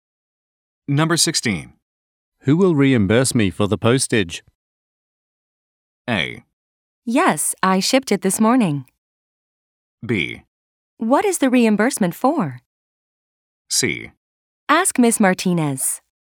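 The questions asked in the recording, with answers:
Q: Who will reimburse me for the postage?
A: C: Ask Miss Martinez.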